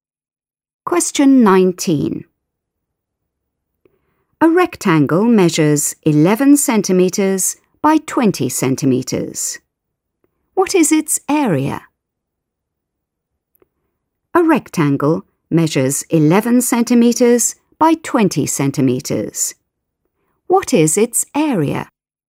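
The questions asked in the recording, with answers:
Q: What is its area?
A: 220 square centimetres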